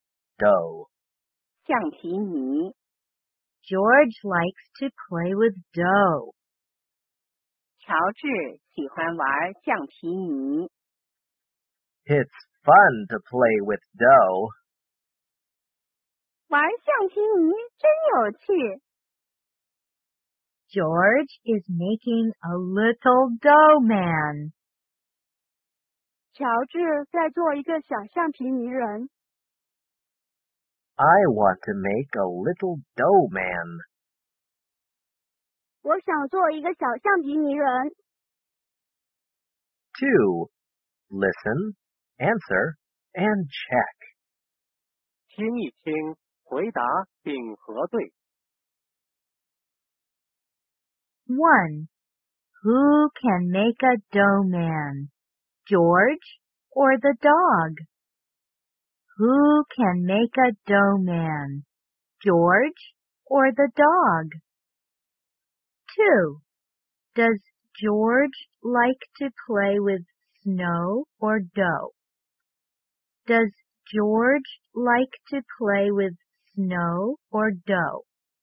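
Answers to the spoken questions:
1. George
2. Dough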